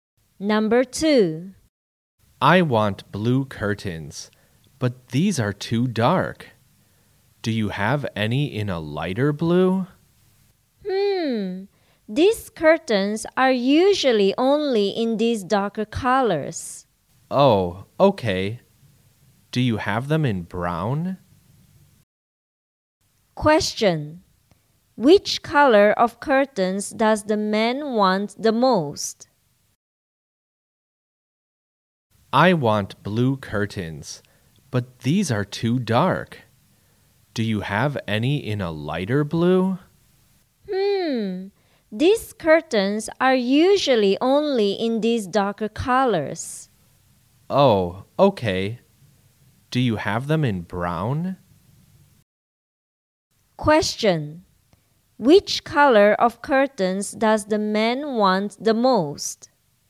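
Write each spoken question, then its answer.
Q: Which color of curtains does the man want the most?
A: Light blue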